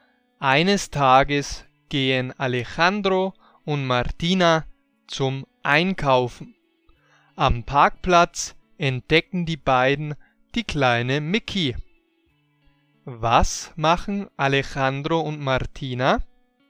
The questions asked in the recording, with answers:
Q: Was machen Alejandro und Martina?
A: Sie gehen zum Einkaufen.